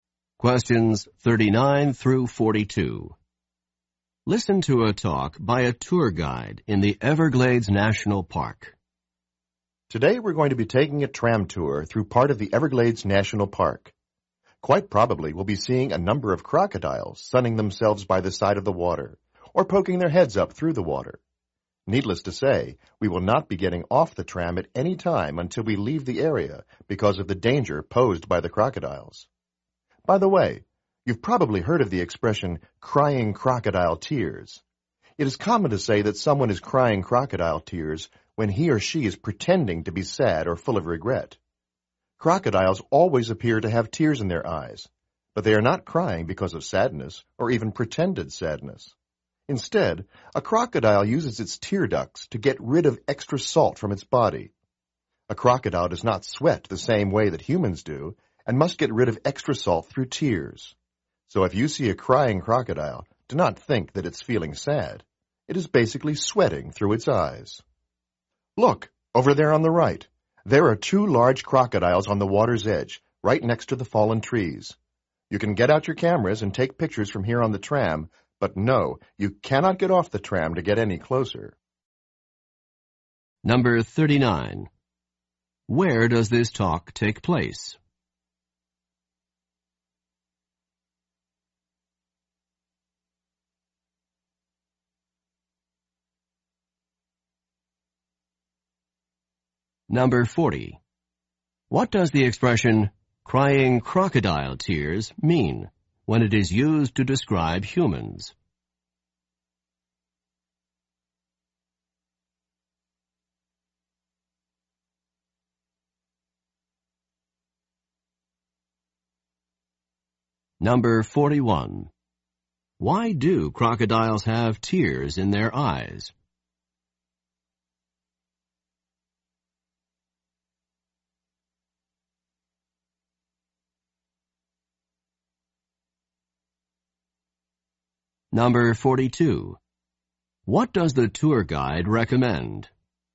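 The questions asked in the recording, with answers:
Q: Where does this talk take place?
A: On a tram in the Everglades National Park

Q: What does the expression, crying crocodile tears, mean when it is used to describe humans?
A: Pretending to be sad or full of regret

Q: Why do crocodiles have tears in their eyes?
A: To get rid of extra salt from their bodies

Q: What does the tour guide recommend?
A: Taking pictures from the tram without getting off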